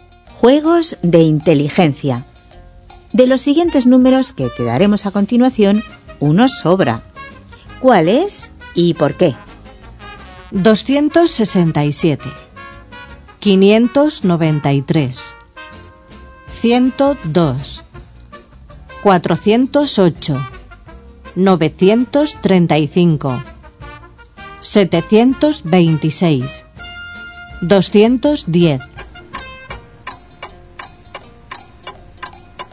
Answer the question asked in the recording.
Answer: Solución. Cada cifra está emparejada con otra que tiene los mismos números, pero en distinto orden, salvo el número 408, que no tiene pareja.